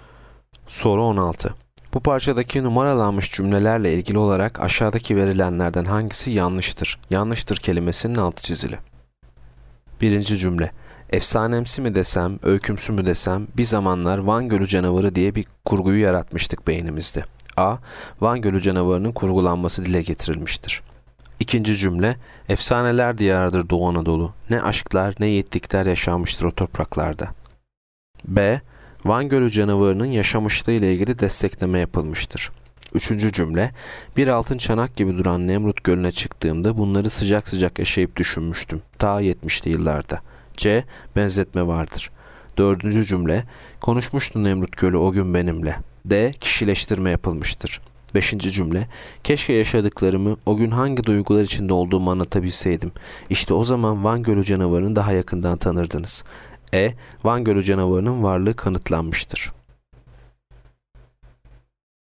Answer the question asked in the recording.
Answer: Yanıt E. Van Gölü canavarının varlığı kanıtlanmıştır.